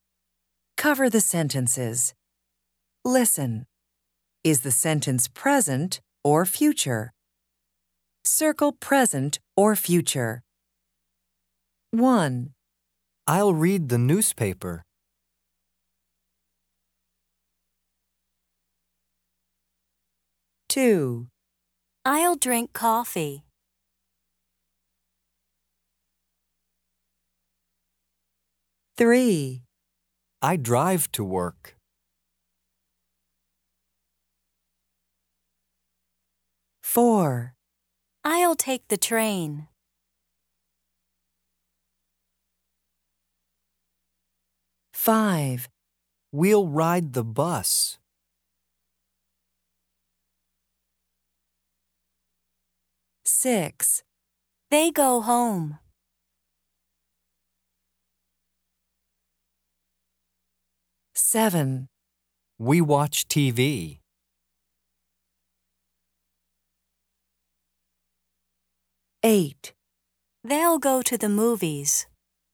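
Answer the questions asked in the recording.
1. future
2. future
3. present
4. future
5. future
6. present
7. present
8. future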